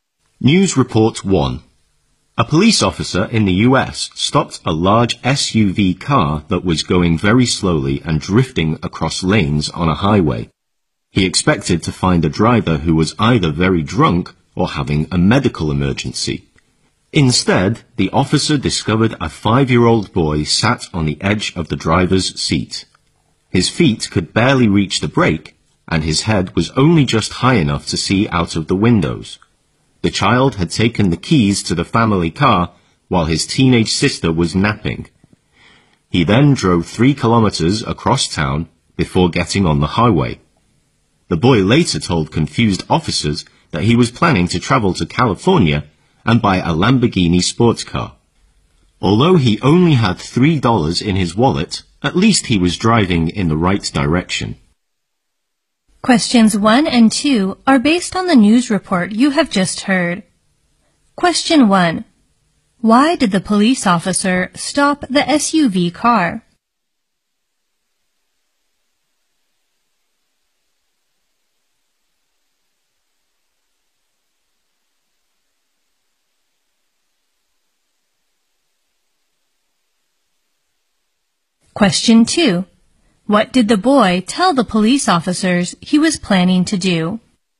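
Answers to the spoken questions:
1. It was going very slowly and drifting across lanes on a highway.
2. Travel to California and buy a Lamborghini sports car.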